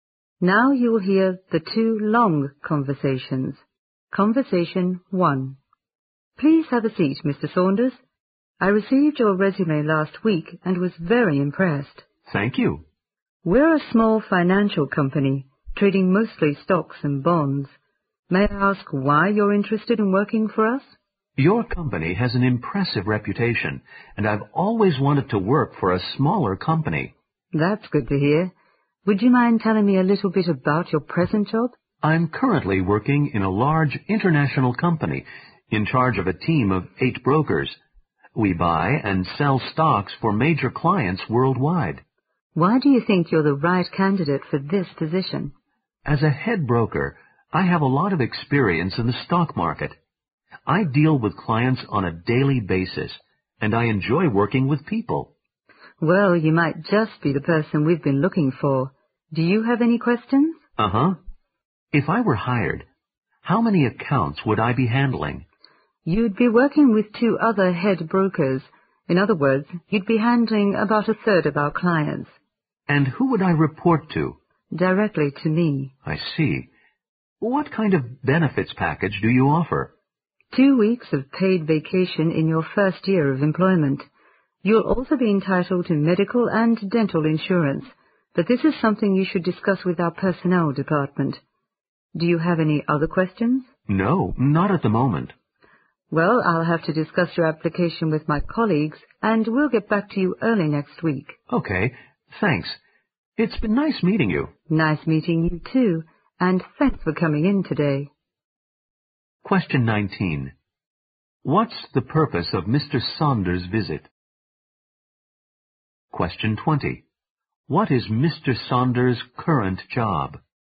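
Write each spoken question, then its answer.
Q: What's the purpose of Mr. Saunders' visit?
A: To have a job interview

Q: What is Mr. Saunders' current job?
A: Head broker in a large international company, in charge of a team of 8 brokers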